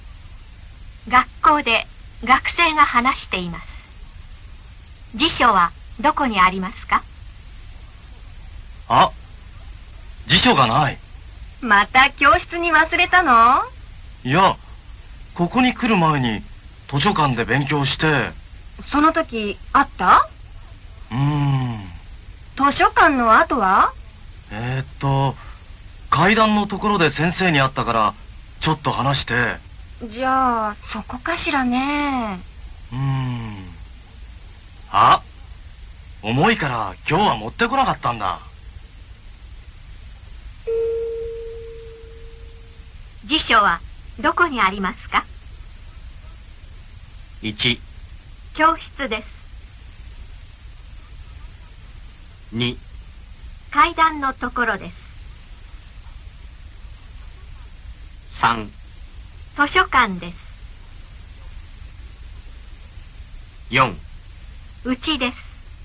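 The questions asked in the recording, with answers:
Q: 辞書はどこにありますか?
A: 4: うちです。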